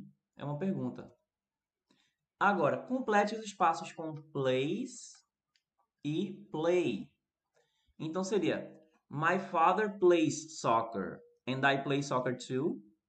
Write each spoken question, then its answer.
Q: Agora, complete os espaços com place e play.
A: Primeiro plays e depois play.